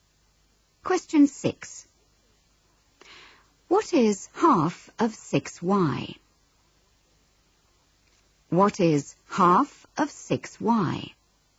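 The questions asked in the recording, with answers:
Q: What is half of 6y?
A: 3y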